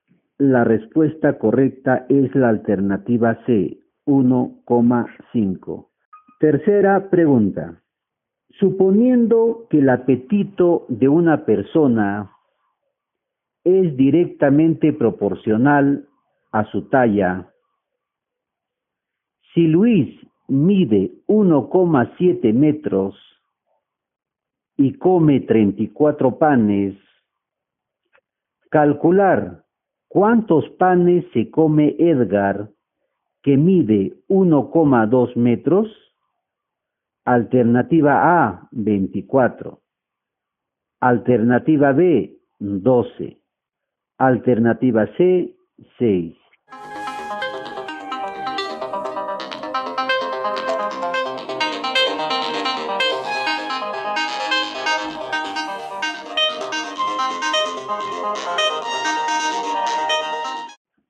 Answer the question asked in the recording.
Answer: La respuesta correcta es la alternativa A, 24.